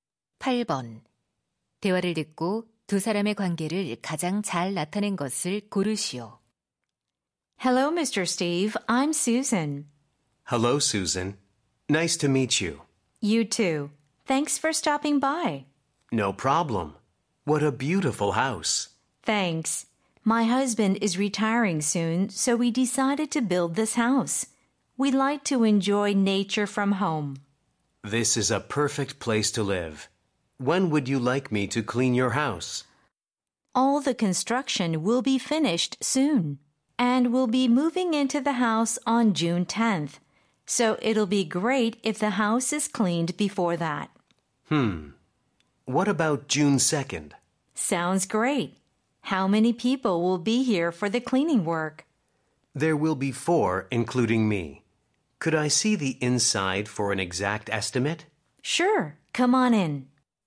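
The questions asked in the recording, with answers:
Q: 대화를 듣고 두 사람의 관계를 가장 잘 나타낸 것을 고르시오.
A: 집주인 - 청소 업체 직원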